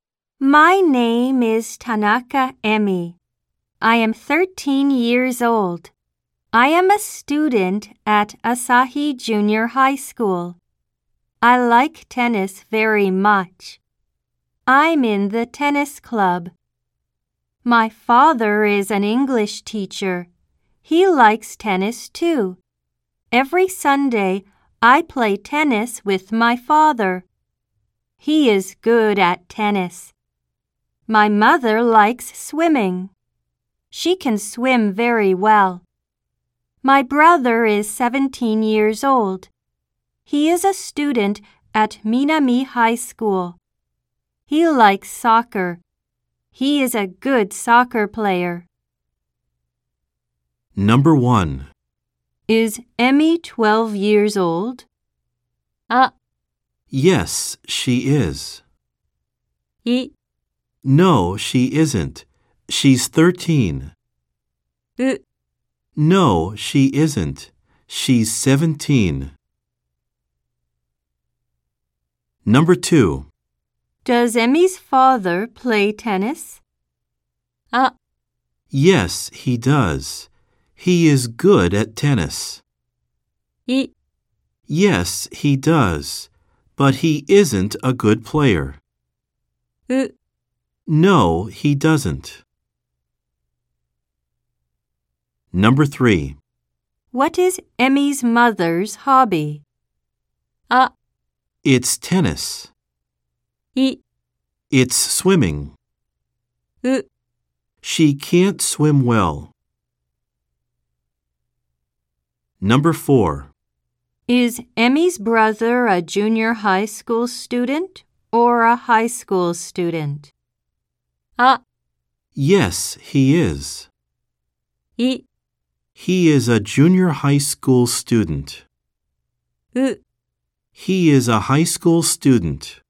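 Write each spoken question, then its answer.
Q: Is Emmy 12 years old?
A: い: No, she isn't. She's 13.

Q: Does Emmy's father play tennis?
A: あ: Yes, he does. He is good at tennis.

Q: What is Emmy's mother's hobby?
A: い: It's swimming.

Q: Is Emmy's brother a junior high school student or a high school student?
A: う: He is a high school student.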